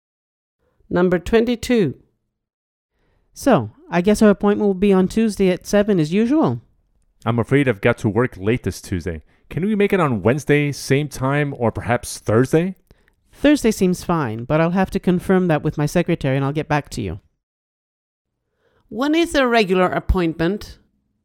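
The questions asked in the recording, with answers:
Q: When is their regular appointment?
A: Tuesday at 7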